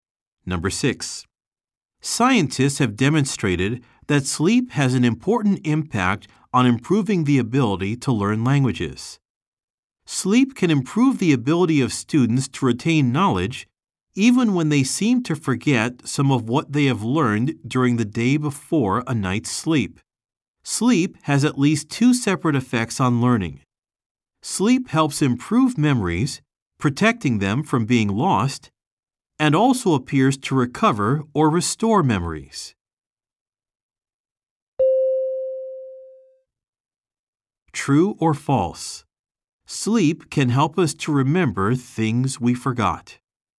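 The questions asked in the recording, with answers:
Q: True or false? Sleep can help us to remember things we forgot.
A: True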